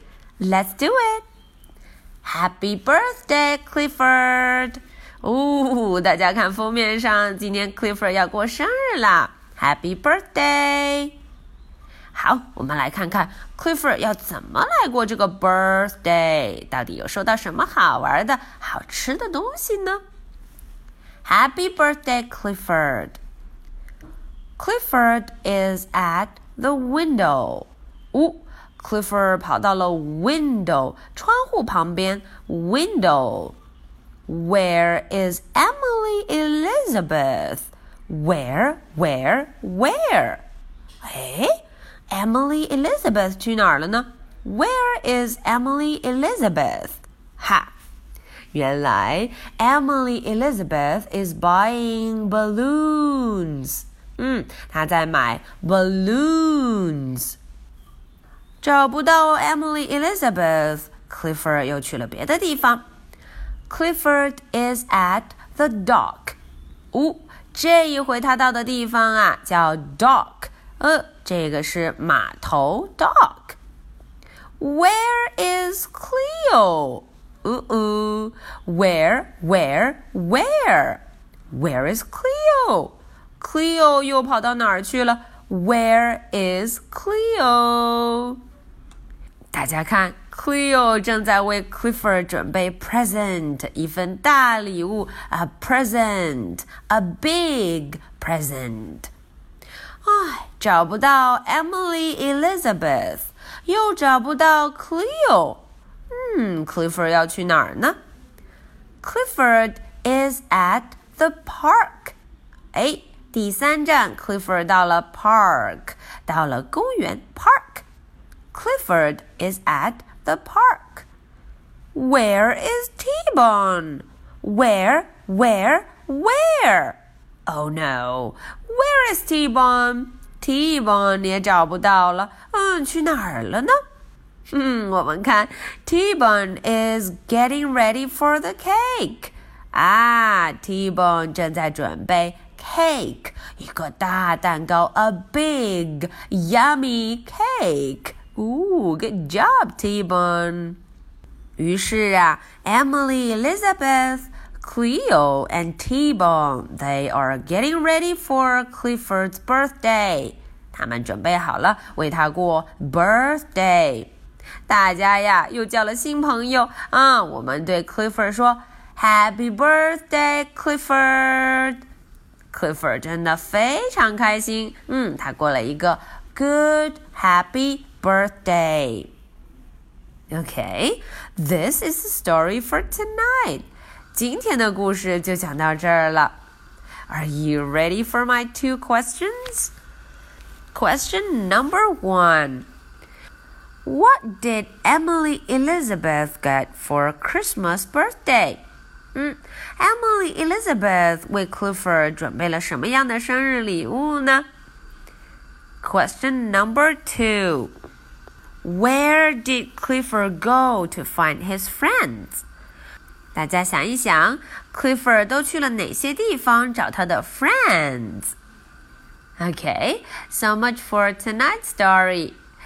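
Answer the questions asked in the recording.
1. Balloons
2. The window, the dock and the park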